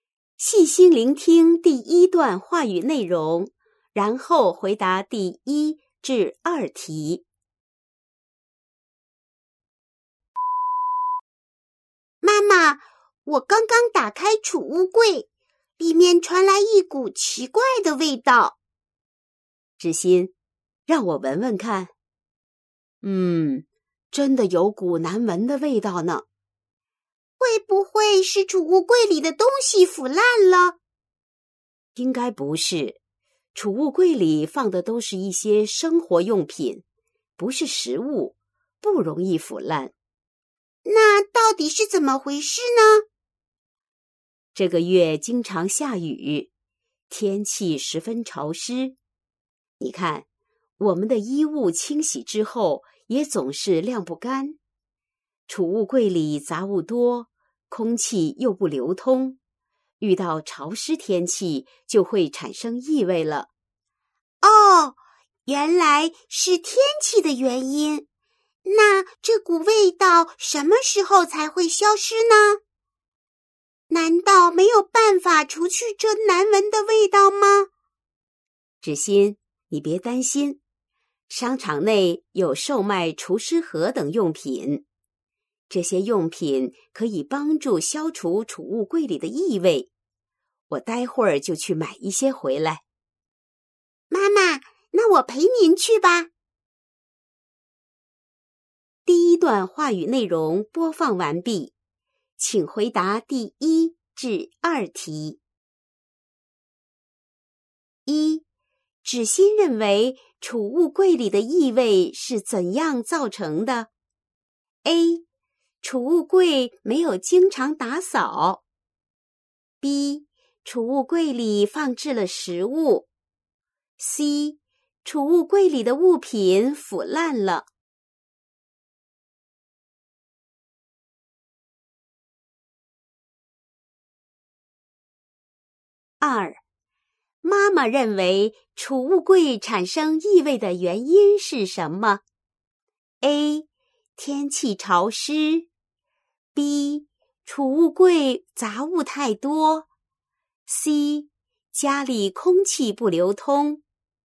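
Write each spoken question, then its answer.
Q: 芷欣认为储物柜里的异味是怎样造成的?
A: C: 储物柜里的物品腐烂了。

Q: 妈妈认为储物柜产生异味的原因是什么?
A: A: 天气潮湿。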